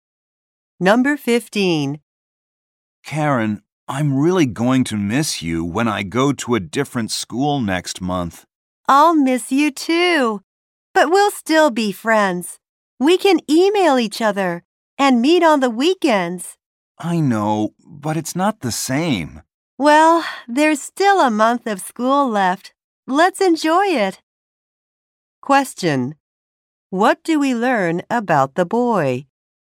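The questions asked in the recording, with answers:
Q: What do we learn about the boy?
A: He will change schools next month.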